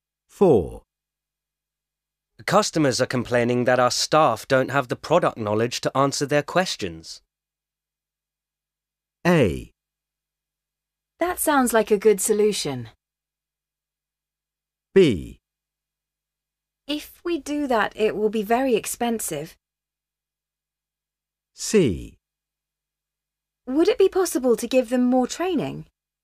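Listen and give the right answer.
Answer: C: Would it be possible to give them more training?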